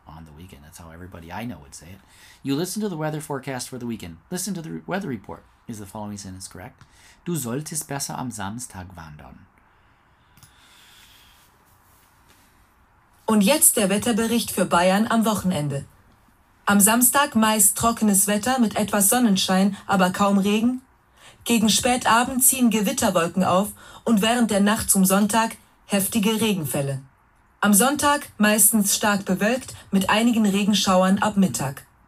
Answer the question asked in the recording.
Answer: Richtig.